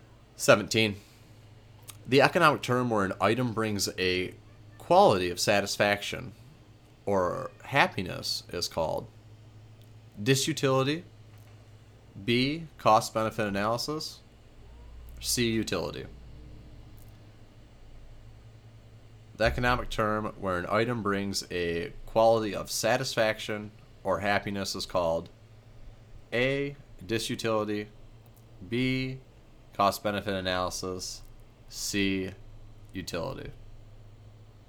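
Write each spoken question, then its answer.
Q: The economic term where an item brings a quality of satisfaction or happiness is called disutility.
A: C: utility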